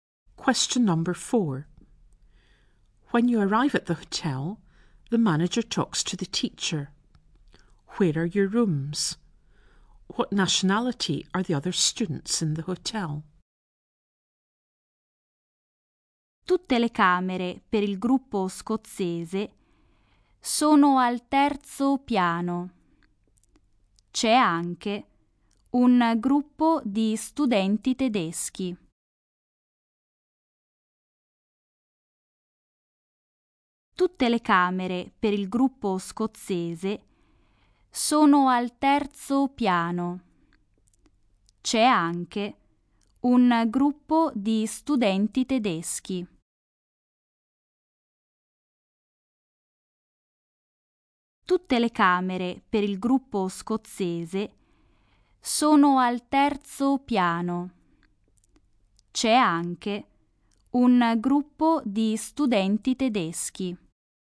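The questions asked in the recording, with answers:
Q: Where are your rooms?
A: On the third floor

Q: What nationality are the other students in the hotel?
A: German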